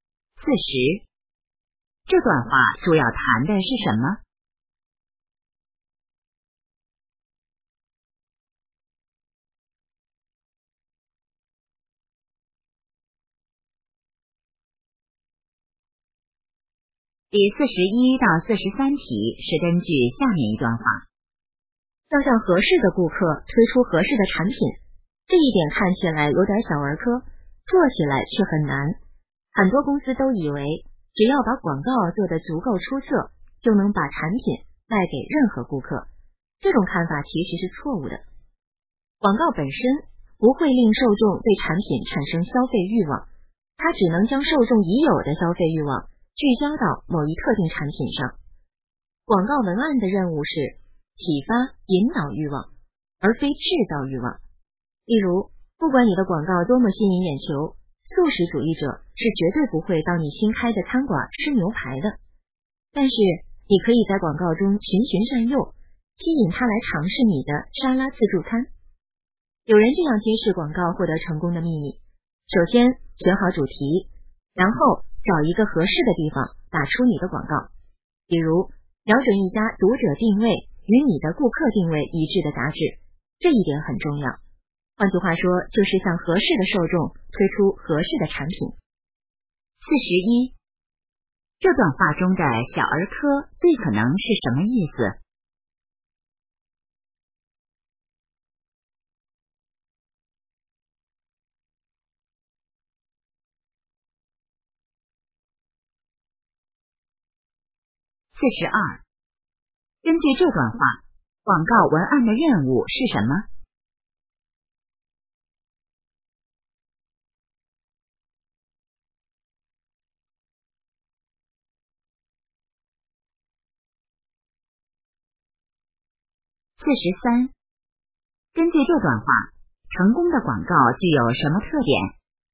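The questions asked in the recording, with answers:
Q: 这段话中的小儿科最可能是什么意思?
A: 很简单

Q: 根据这段话,广告文案的任务是什么?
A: 启发引导欲望

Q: 根据这段话,成功的广告具有什么特点?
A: 向合适的受众推出合适的产品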